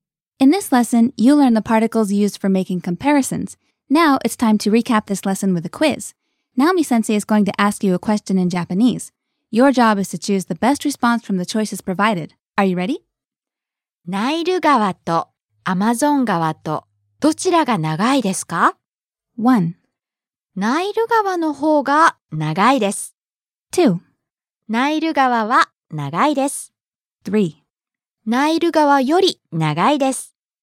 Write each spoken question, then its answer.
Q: ナイル川とアマゾン川とどちらが長いですか?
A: Choice 1. ナイル川の方が長いです。The Nile River is longer.